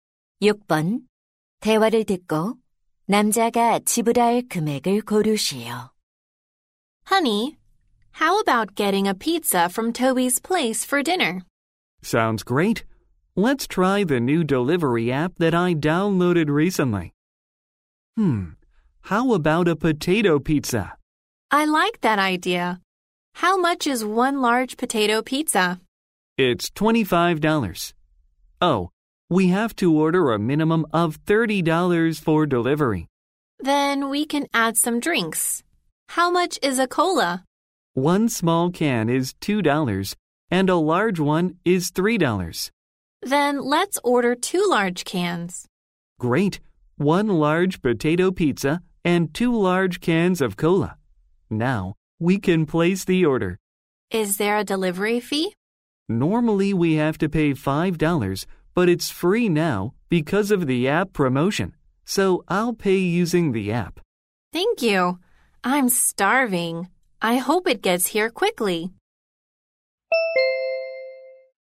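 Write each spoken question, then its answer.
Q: 대화를 듣고 남자가 지불할 금액을 고르시오.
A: $31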